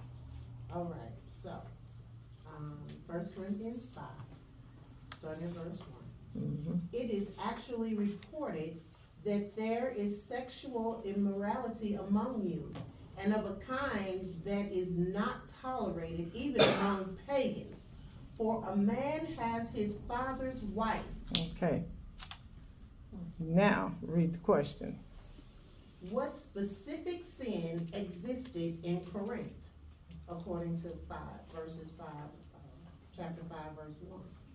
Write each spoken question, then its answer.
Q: What specific sin existed in Corinth, according to chapter 5, verse 1?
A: And there was sexual immorality in the form of a man sleeping with his father's wife.